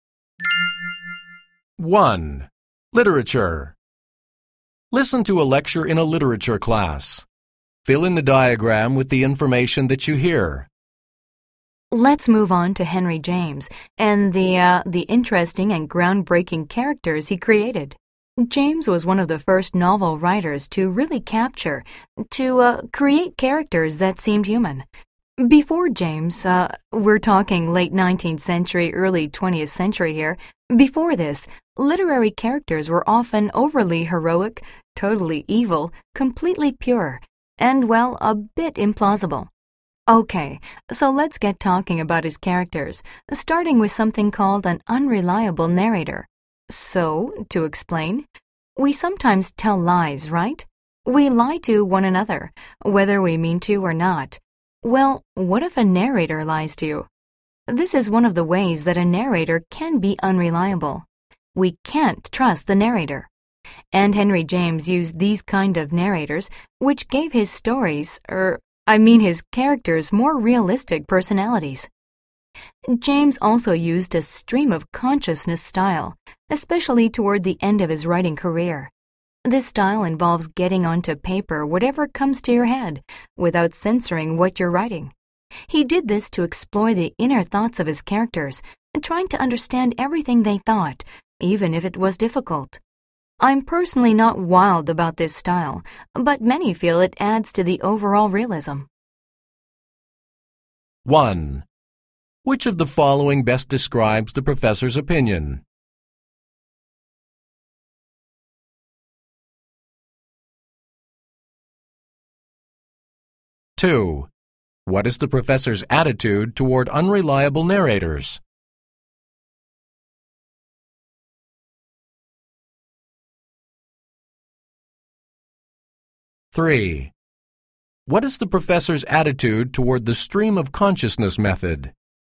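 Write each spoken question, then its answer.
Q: What is the professor's attitude toward the stream of consciousness method?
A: He personally doesn't like it much, but he accepts that many feel it adds realism.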